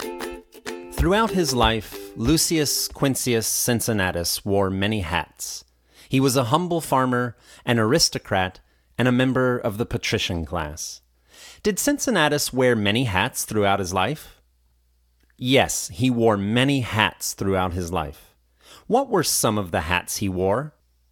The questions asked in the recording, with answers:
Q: What were some of the hats he wore?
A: He was a humble farmer, an aristocrat, and a member of the patrician class.